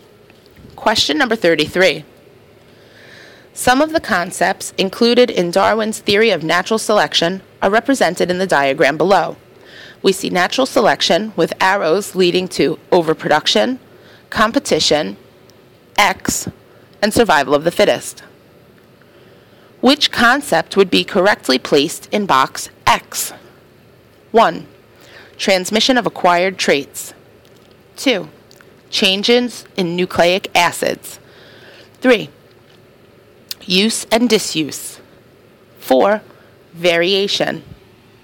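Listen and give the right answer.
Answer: 4: Variation.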